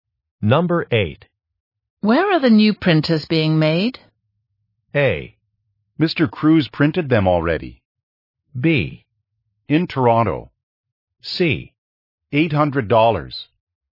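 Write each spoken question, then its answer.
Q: Where are the new printers being made?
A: B: In Toronto.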